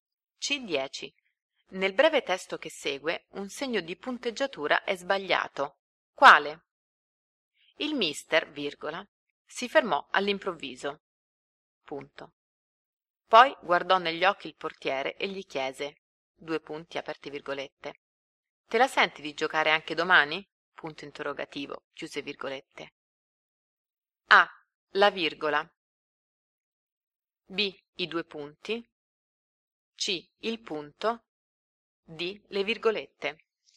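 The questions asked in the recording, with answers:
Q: Nel breve testo che segue, un segno di punteggiatura è sbagliato.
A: A: La virgola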